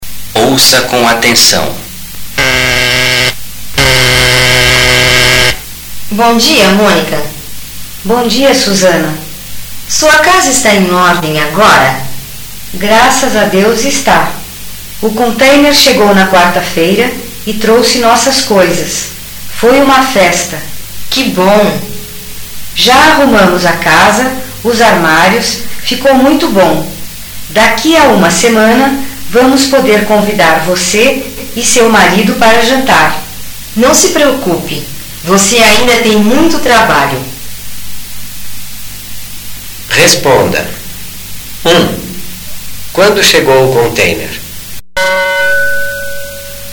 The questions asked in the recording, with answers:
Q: Quando chegou o container?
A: O container chegou na quarta-feira.